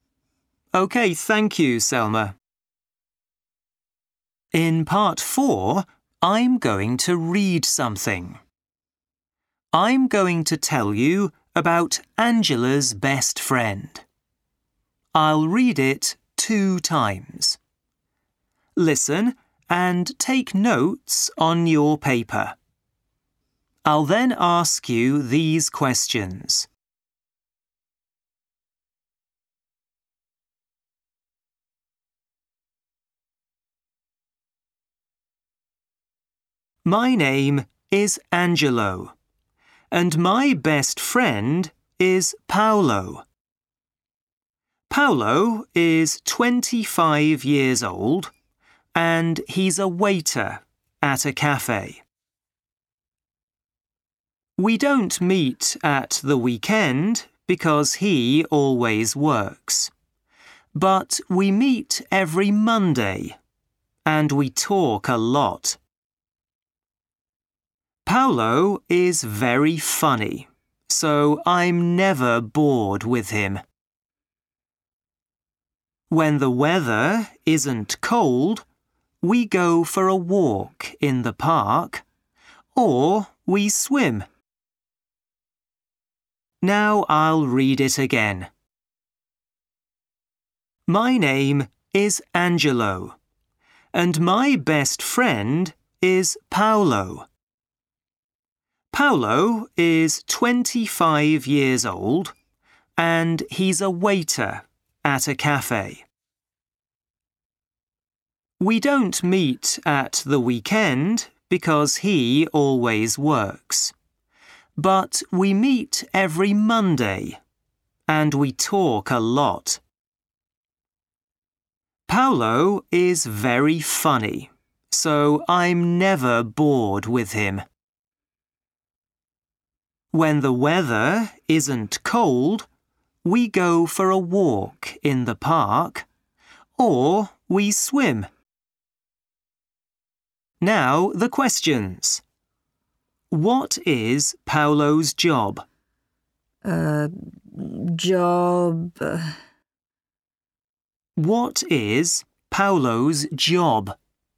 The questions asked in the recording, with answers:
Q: What is Paolo's job?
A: Waiter.